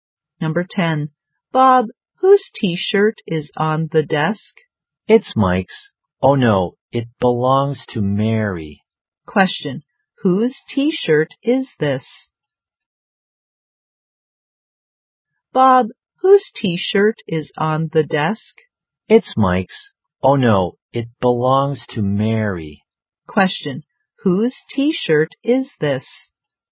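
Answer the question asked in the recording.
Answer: Mary's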